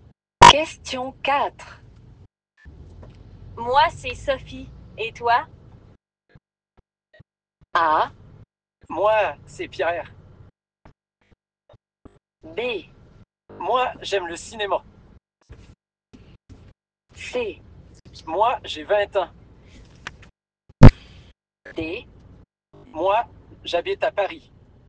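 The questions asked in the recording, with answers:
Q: Moi, c'est Sophie. Et toi?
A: A: Moi, c'est Pierre.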